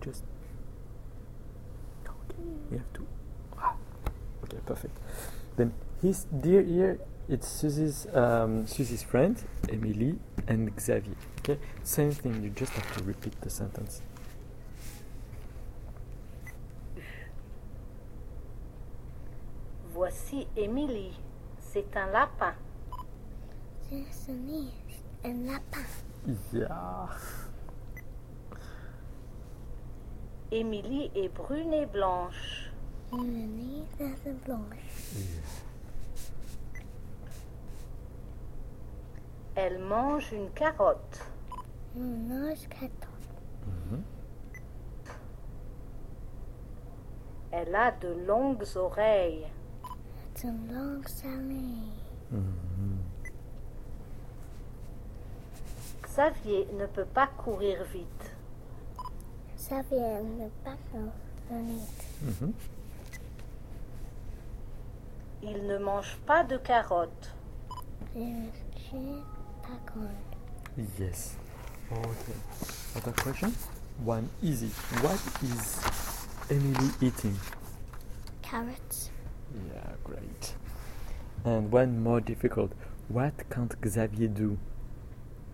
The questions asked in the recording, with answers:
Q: What can't Xavier do?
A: he can't run very fast.